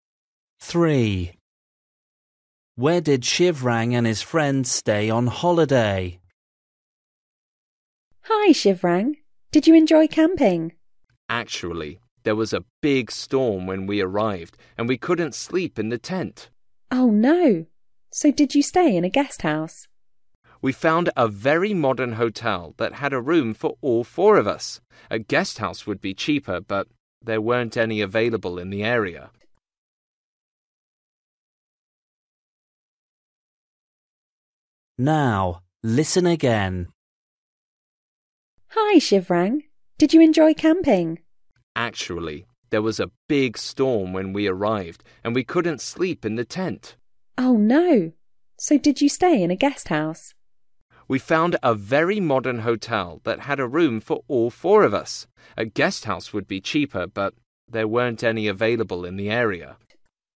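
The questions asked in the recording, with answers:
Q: Where did Shivrang and his friends stay on holiday?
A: In a modern hotel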